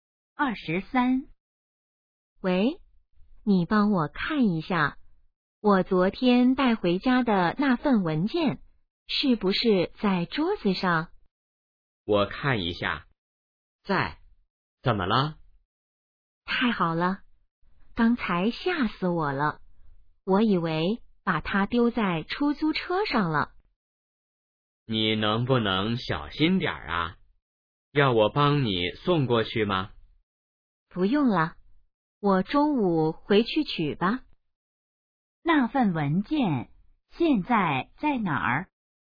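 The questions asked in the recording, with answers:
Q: 那份文件现在在哪儿?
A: 在家里桌子上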